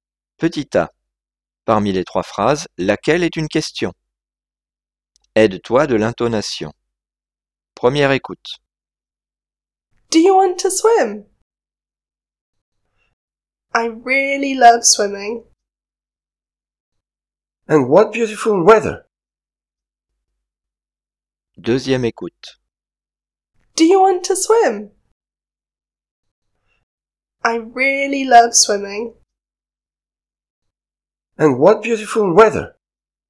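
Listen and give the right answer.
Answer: Do you want to swim?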